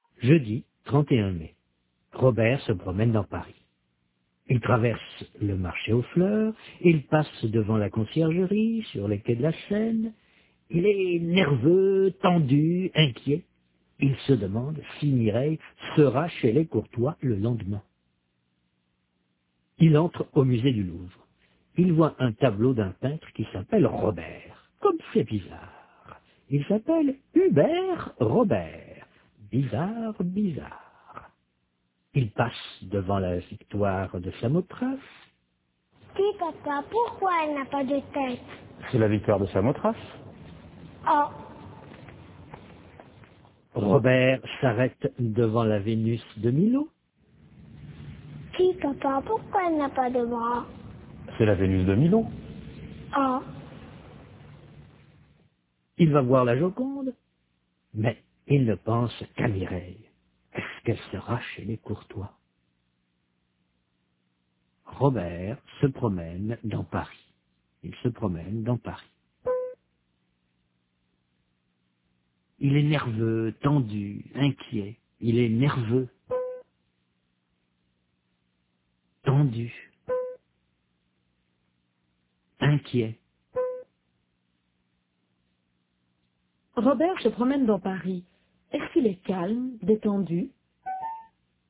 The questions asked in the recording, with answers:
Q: Est-ce qu'il est calme, détendu?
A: Non, il est nerveux, tendu, inquiet.